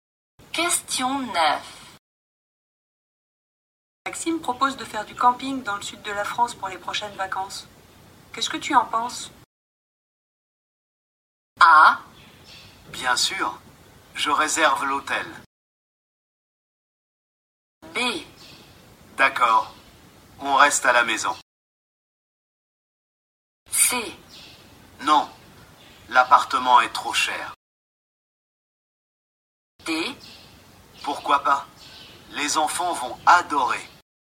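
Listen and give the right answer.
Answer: D: Pourquoi pas? Les enfants vont adorer.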